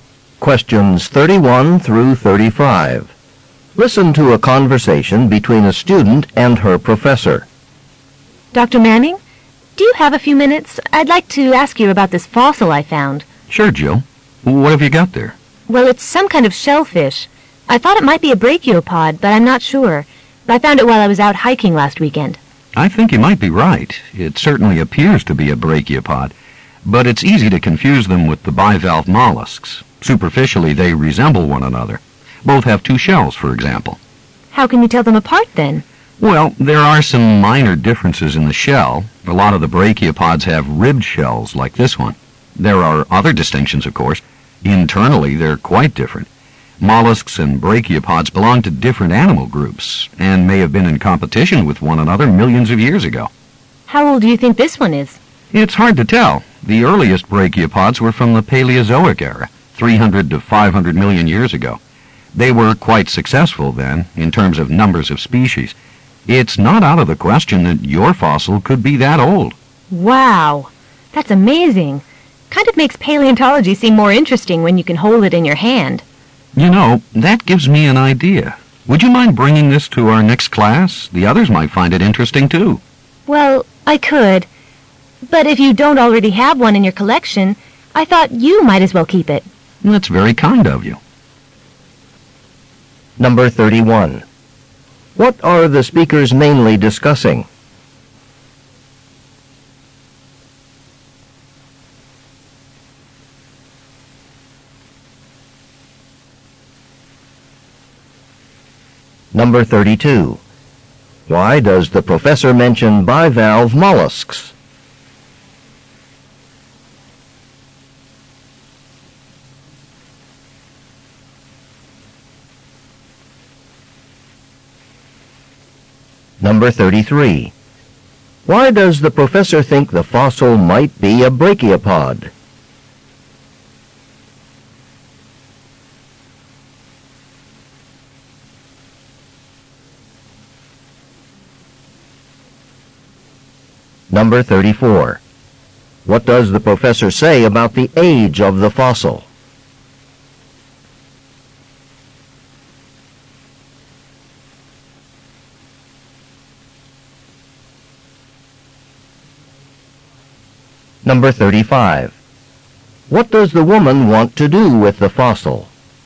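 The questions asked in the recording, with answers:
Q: What are the speakers mainly discussing?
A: A fossil the student found

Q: Why does the professor mention bivalve mollusks?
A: They are easy to confuse with brachiopods.

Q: Why does the professor think the fossil might be a brachiopod?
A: It has a ribbed shell.

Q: What does the professor say about the age of the fossil?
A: It could be 300 to 500 million years old.

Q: What does the woman want to do with the fossil?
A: Give it to the professor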